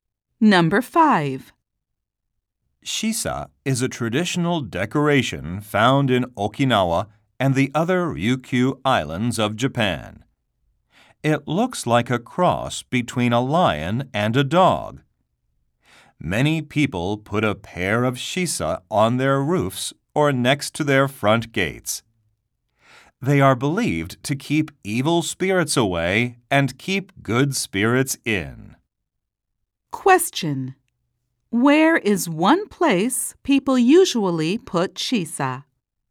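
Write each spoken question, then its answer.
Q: Where is one place people usually put shisa?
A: On their roofs or next to their front gates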